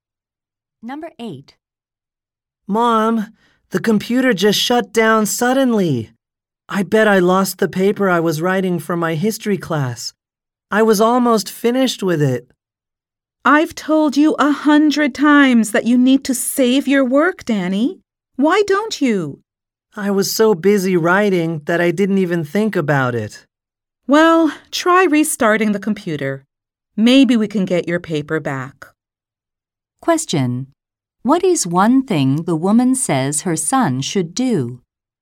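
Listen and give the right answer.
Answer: Save his work.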